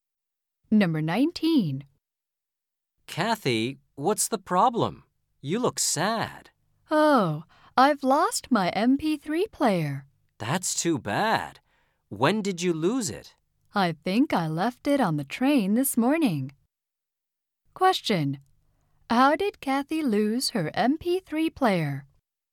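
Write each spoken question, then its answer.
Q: How did Kathy lose her MP3 player?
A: She left it on the train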